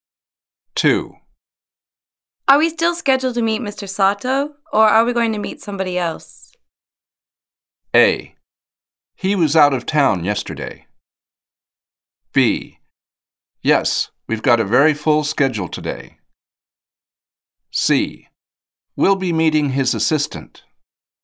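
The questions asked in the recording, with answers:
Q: Are we still scheduled to meet Mr. Sato, or are we going to meet somebody else?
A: C: We'll be meeting his assistant.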